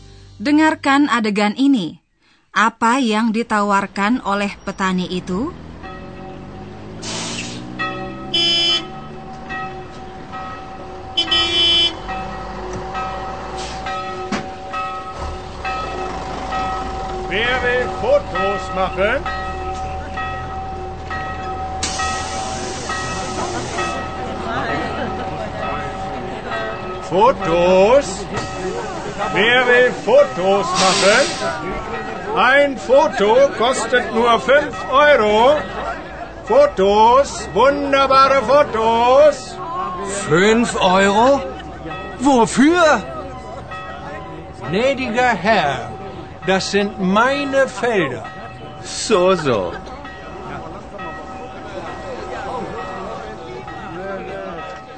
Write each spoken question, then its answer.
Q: Apa yang ditawarkan oleh petani itu?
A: Yang ditawarkan oleh sang petani kepada para turis hanyalah kesempatan untuk memotret.